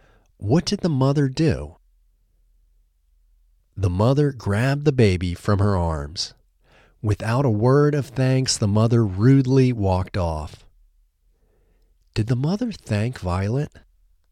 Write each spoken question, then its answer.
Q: Did the mother thank Violet?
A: No, the mother didn't thank Violet.